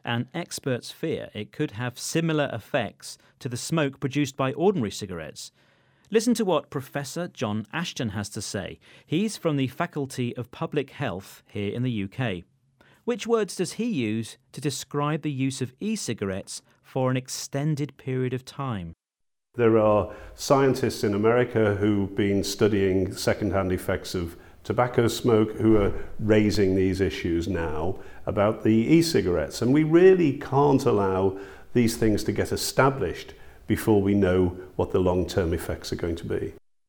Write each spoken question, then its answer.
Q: Which words does he use to describe the use of e-cigarettes for an extended period of time?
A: He talks about long-term effects